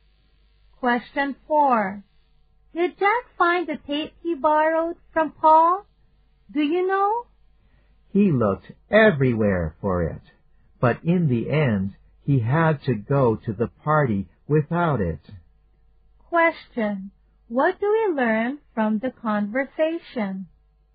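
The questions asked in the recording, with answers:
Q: What do we learn from the conversation?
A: Jack didn't find the tape and went to the party without it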